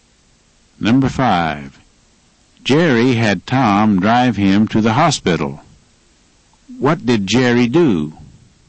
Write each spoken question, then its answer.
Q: What did Jerry do?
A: He had Tom drive him to the hospital.